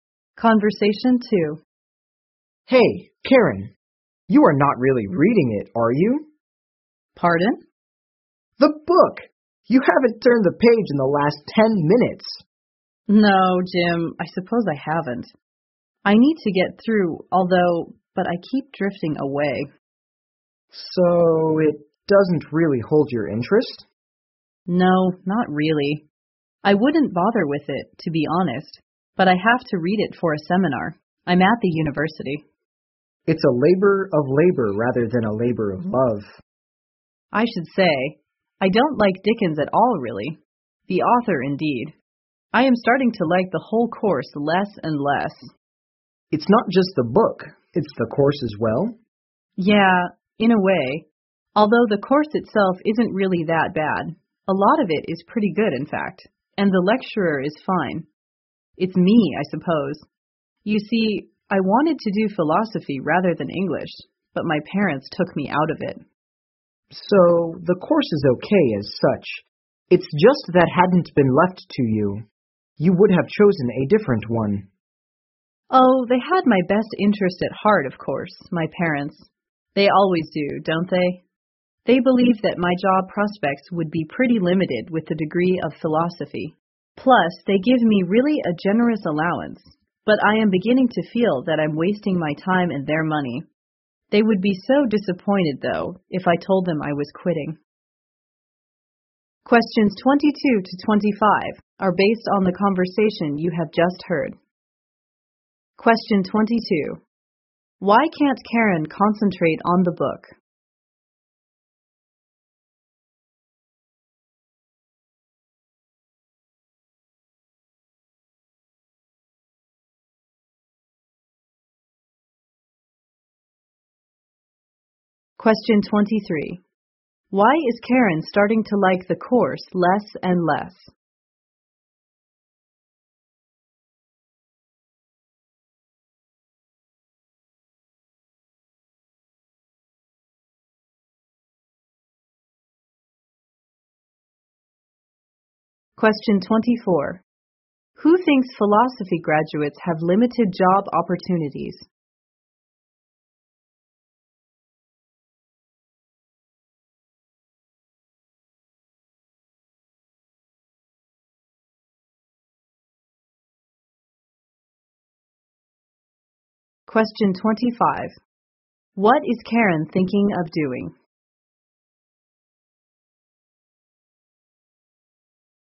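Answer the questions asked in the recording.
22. She doesn't find it interesting; she doesn't like Dickens
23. She wanted to study philosophy, but her parents didn't let her
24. Karen's parents
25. Quitting the course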